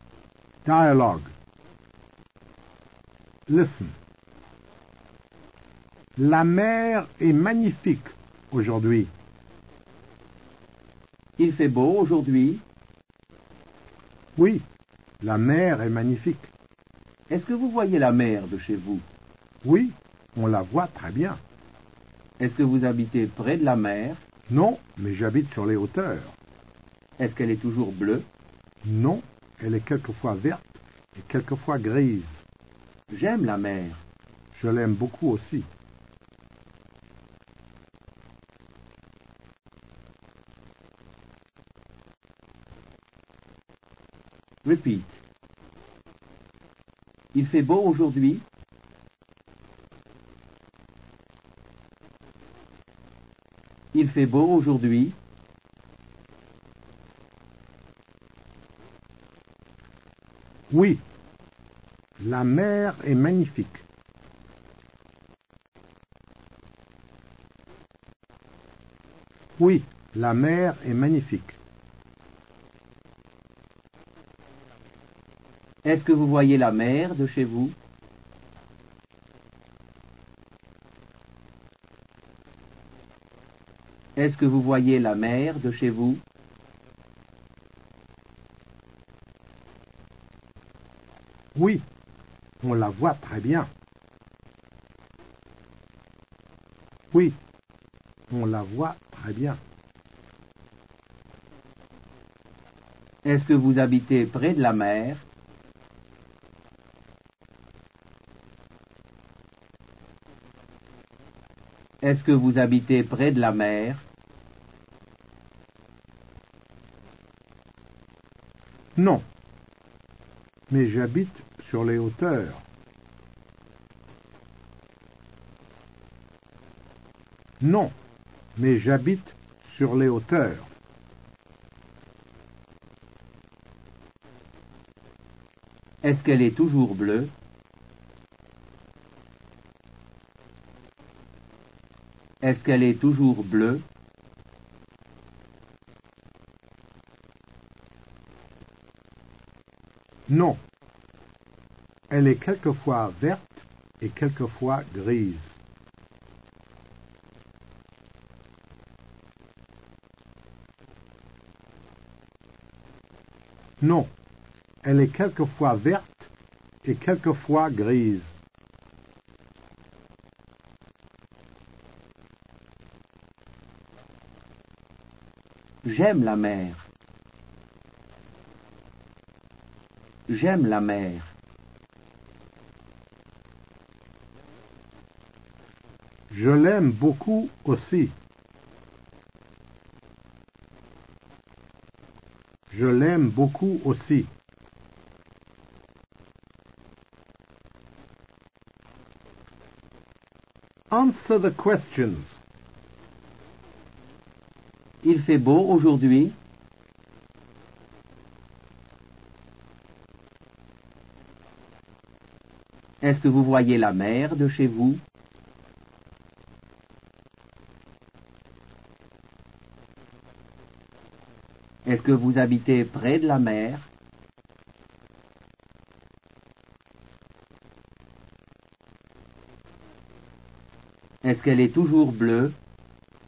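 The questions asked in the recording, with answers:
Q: Est-ce que vous voyez la mer de chez vous?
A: Oui, on la voit très bien.

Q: Est-ce que vous habitez près de la mer?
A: Non, mais j'habite sur les hauteurs.

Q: Est-ce qu'elle est toujours bleue?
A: Non, elle est quelquefois verte et quelquefois grise.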